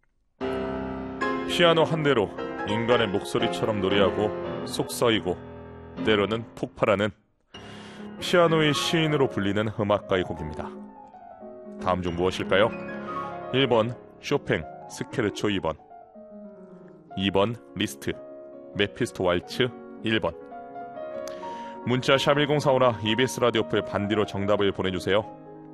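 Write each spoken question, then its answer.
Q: 다음 중 무엇일까요? 1번 쇼팽 스케르초 2번 2번 리스트 메피스토 왈츠 1번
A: 1: 쇼팽 스케르초 2번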